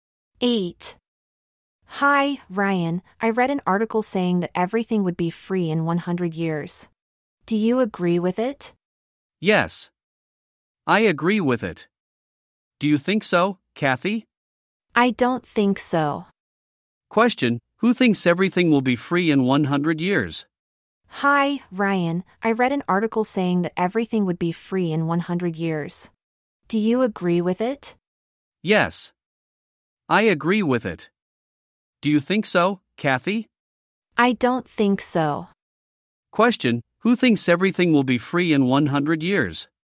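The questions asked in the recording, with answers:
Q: Question: who thinks everything will be free in 100 years?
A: Ryan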